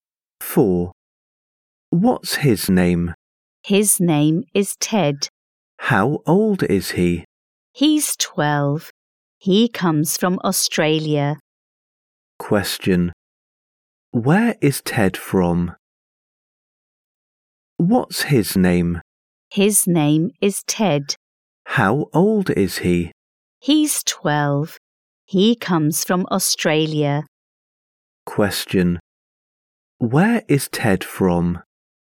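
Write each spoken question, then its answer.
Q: Where is Ted from?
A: Australia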